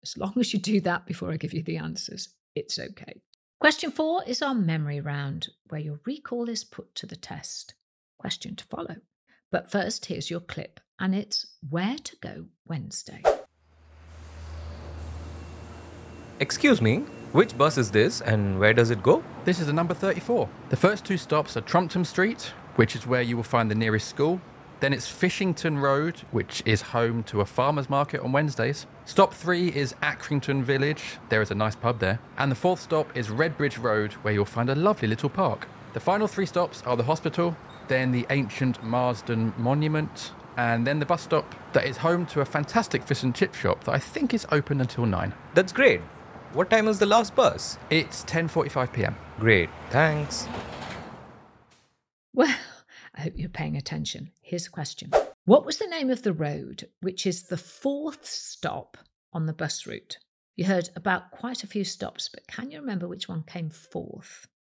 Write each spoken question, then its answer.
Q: What was the name of the road which is the fourth stop on the bus route?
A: The answer is Redbridge Road.